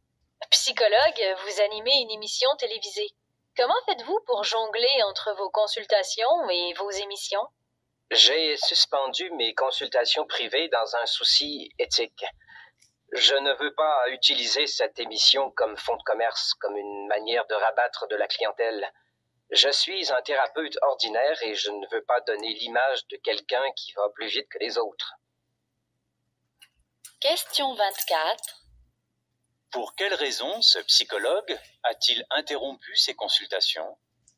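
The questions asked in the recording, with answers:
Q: Pour quelle raison ce psychologue a-t-il interrompu ses consultations?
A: Pour des raisons éthiques : il ne veut pas utiliser l'émission pour attirer des clients.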